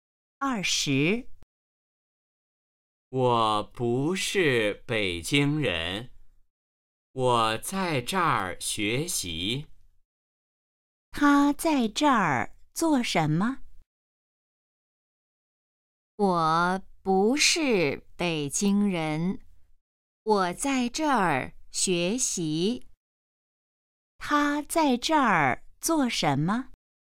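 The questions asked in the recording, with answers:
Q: 他在这儿做什么?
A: 学习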